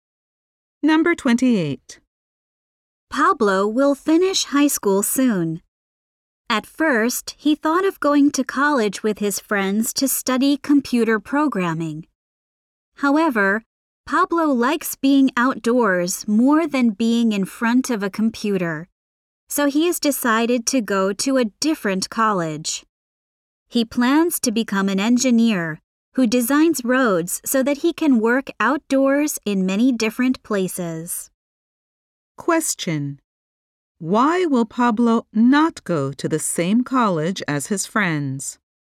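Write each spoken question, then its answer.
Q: Question: Why will Pablo not go to the same college as his friends?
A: He likes being outdoors more than being in front of a computer.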